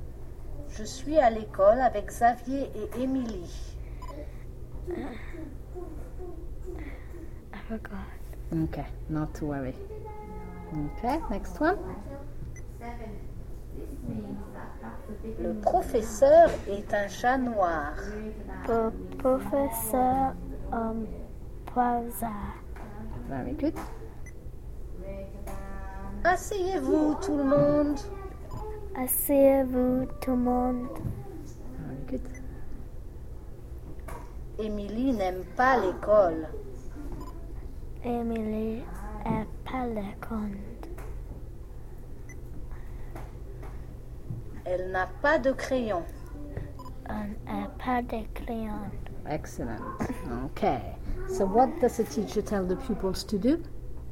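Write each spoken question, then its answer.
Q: So what does the teacher tell the pupils to do?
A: Sit down, everyone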